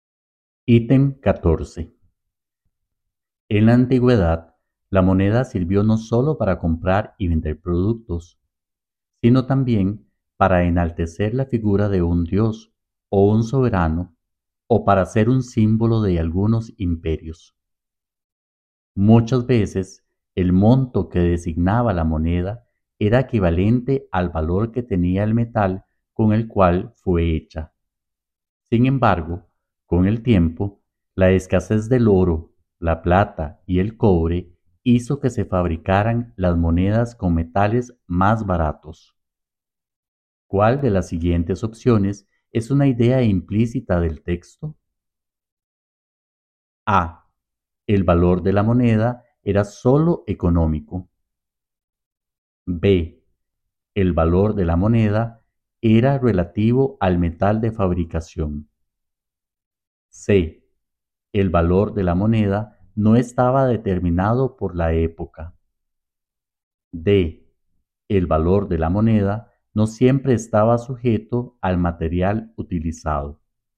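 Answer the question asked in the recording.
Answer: D: El valor de la moneda no siempre estaba sujeto al material utilizado.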